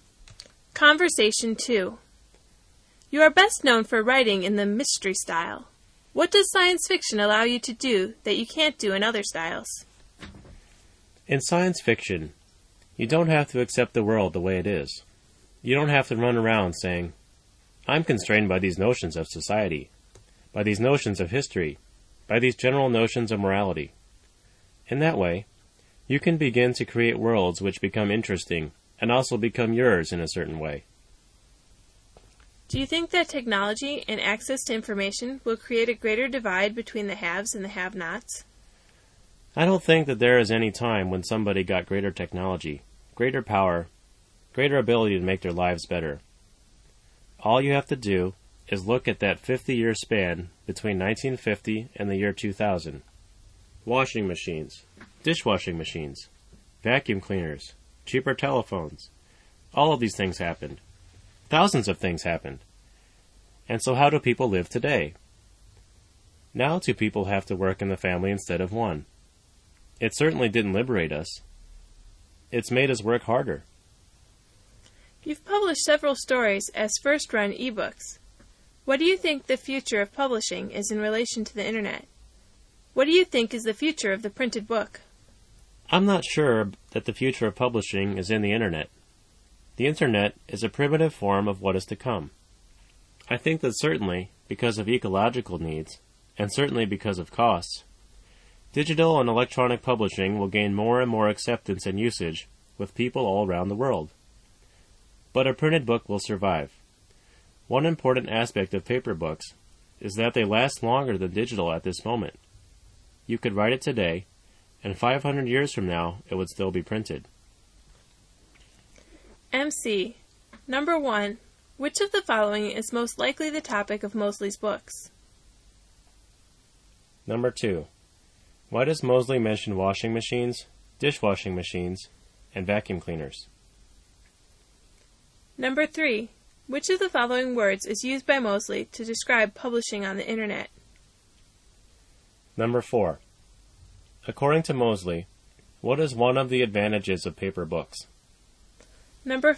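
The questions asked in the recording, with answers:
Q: Number three, which of the following words is used by Mosley to describe publishing on the internet?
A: primitive

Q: Number four, according to Mosley, what is one of the advantages of paper books?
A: They last longer than digital books.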